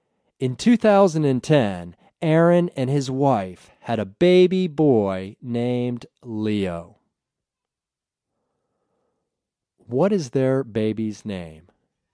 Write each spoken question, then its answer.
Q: What is their baby's name?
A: Their baby's name is Leo.